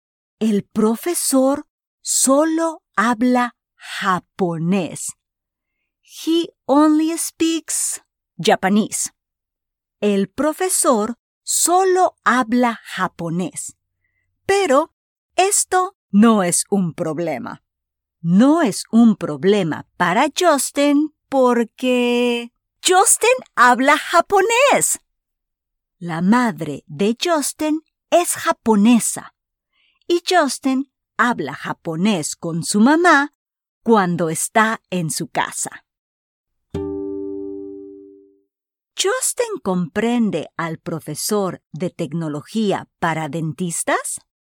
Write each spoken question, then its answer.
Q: Justin comprende al profesor de tecnología para dentistas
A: Sí, Justin comprende al profesor porque habla japonés.